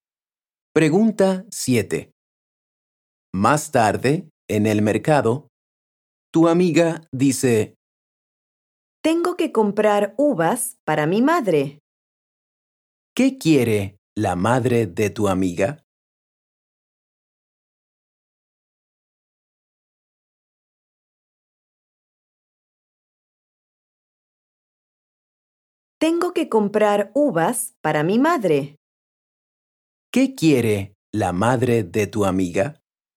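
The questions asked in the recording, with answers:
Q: ¿Qué quiere la madre de tu amiga?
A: uvas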